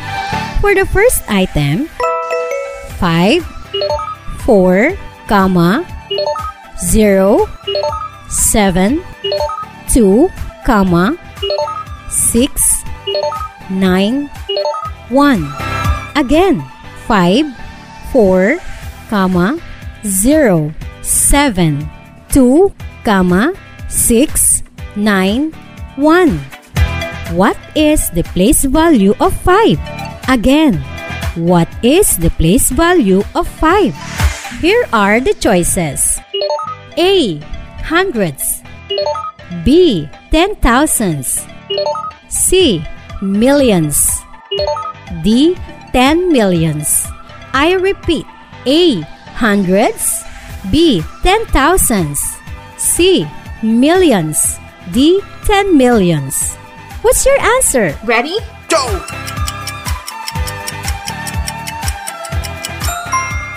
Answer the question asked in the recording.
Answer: That's great! It's letter D.